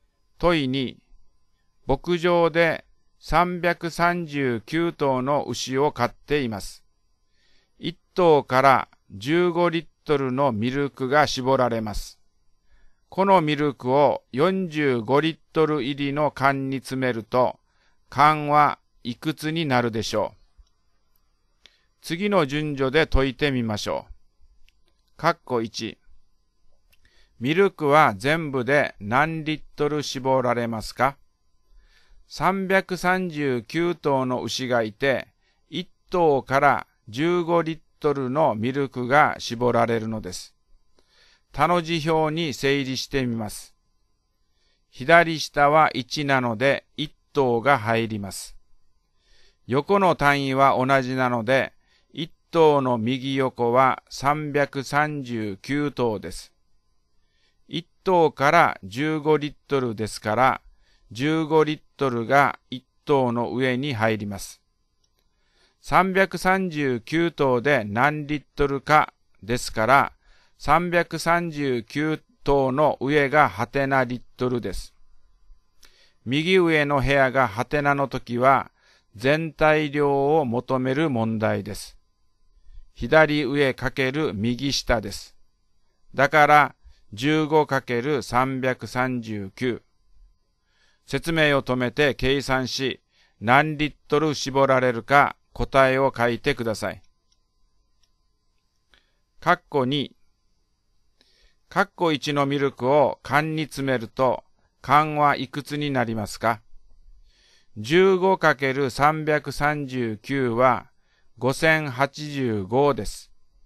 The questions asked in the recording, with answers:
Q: 括弧1。ミルクは全部で何リットル絞られますか?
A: 15×339 は 5085です。